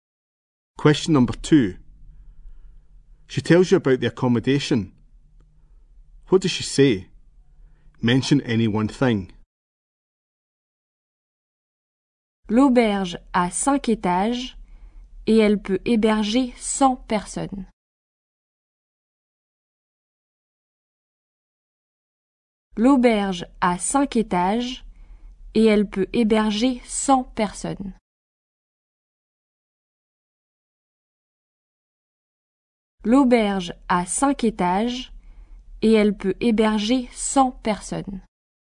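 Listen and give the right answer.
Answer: The hostel has 5 floors / it can hold 100 people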